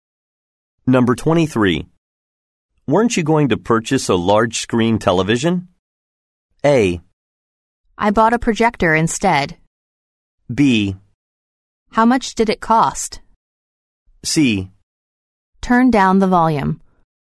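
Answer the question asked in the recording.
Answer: A: I bought a projector instead.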